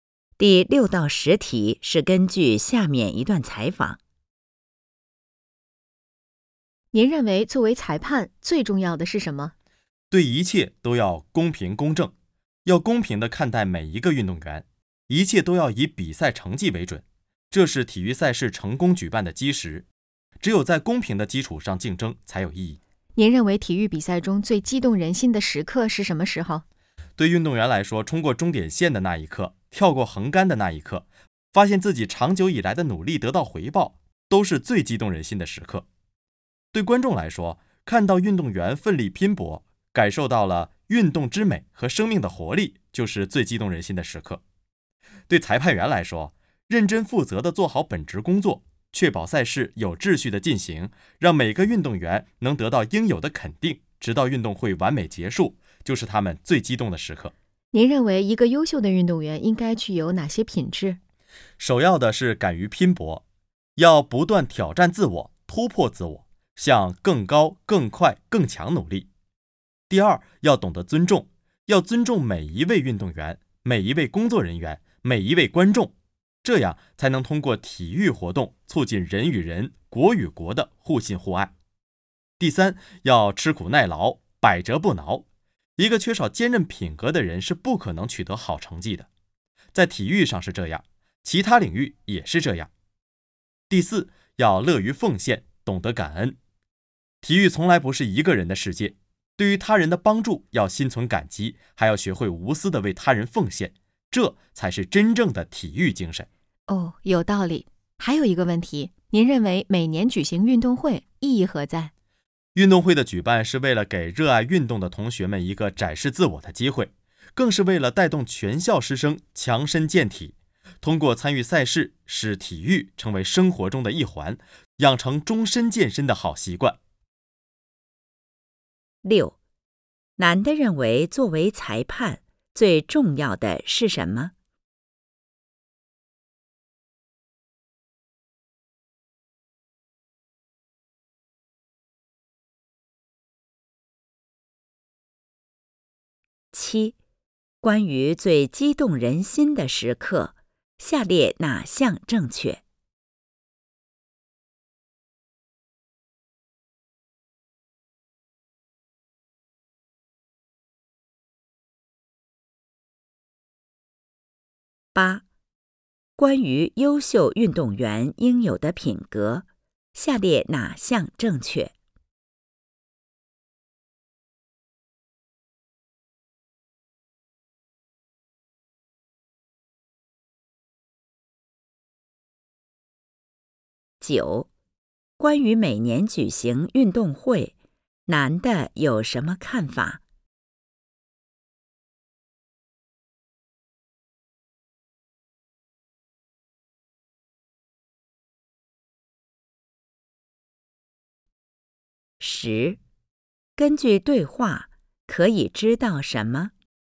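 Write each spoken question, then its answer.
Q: 男的认为作为裁判最重要的是什么?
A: 公平公正地对待每一个运动员

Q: 关于每年举行运动会,男的有什么看法?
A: 给学生展示自我的机会,带动师生强身健体,养成终身健身的习惯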